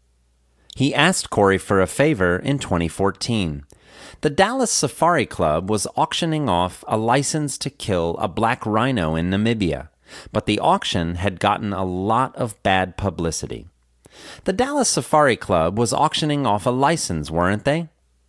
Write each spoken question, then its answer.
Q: The Dallas Safari Club was auctioning off a license, weren't they?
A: Yes, the Dallas Safari Club was auctioning off a license.